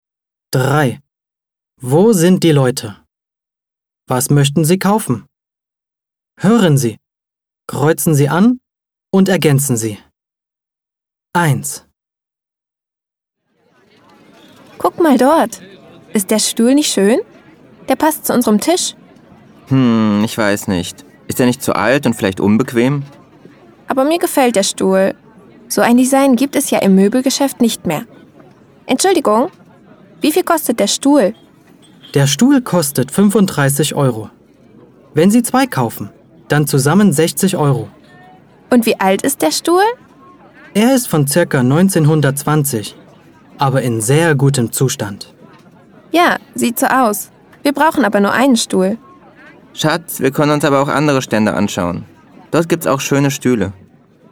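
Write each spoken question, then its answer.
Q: Was möchten Sie kaufen?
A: Einen Stuhl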